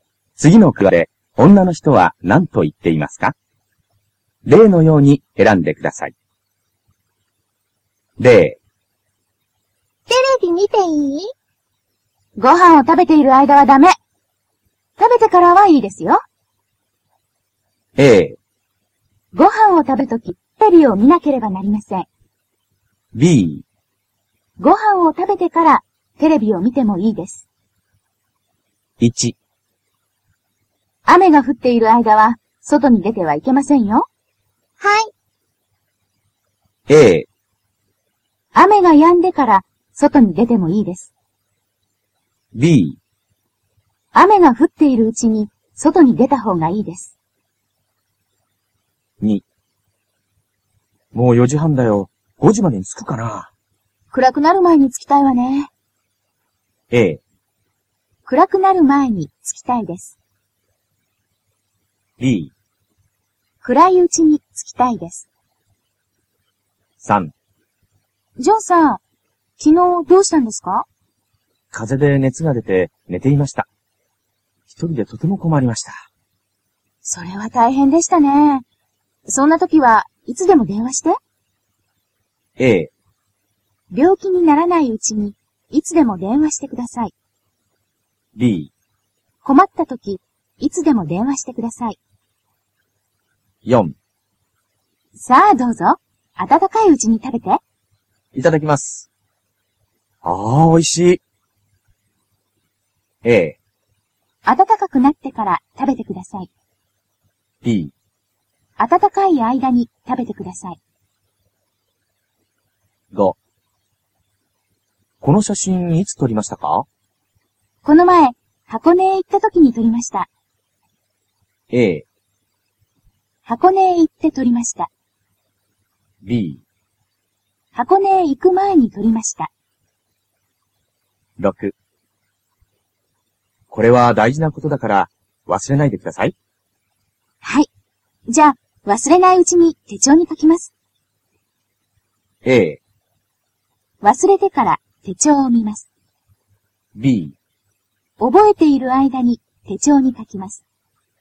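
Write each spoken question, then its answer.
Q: 次の句で、女の人は何と言っていますか?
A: A: 雨が止んでから、外に出てもいいです。

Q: 次の句で、女の人は何と言っていますか?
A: A: 暗くなる前に着きたいです。

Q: 次の句で、女の人は何と言っていますか?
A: B: 困った時、いつでも電話してください。

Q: 次の句で、女の人は何と言っていますか?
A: B: 暖かい間に食べてください。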